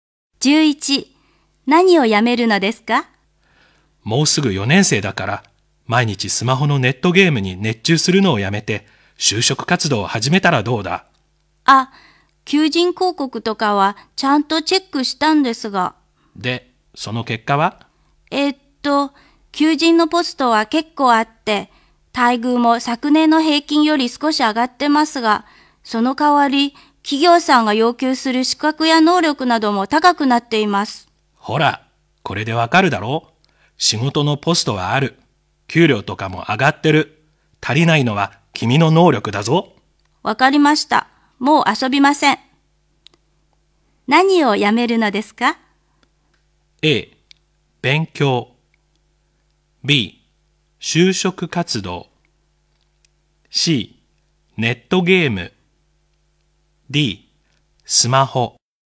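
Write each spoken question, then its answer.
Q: 何をやめるのですか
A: C: ネットゲーム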